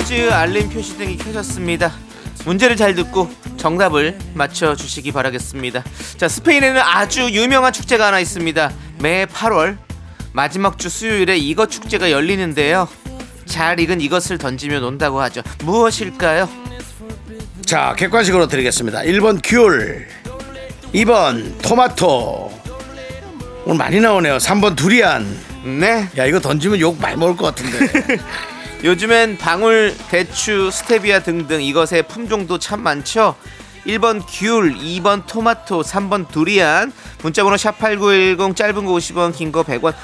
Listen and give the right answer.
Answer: 스페인으로 향하는 기장 퀴즈 첫 번째 문제 정답은 바로 2번 토마토였습니다